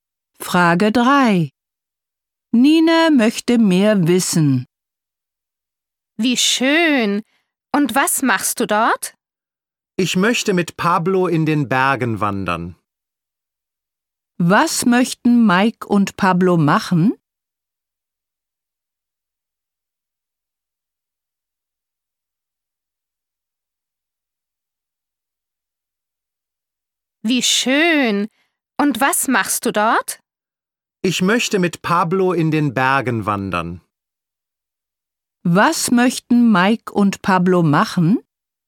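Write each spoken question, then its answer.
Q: Was möchten Mike und Pablo machen?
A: In den Bergen wandern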